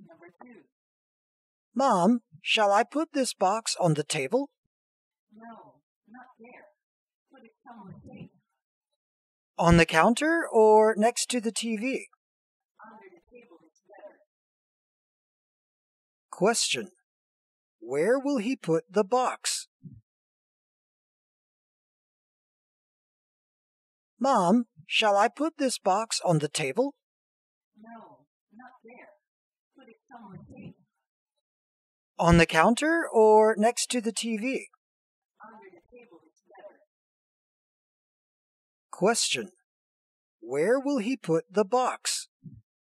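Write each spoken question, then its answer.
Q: Where will he put the box?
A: Under the table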